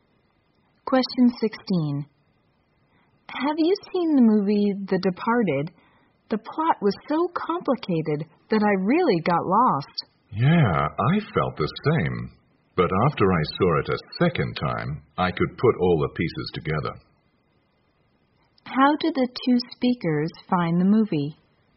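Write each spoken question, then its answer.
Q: How did the two speakers find the movie?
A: Hard to follow / confusing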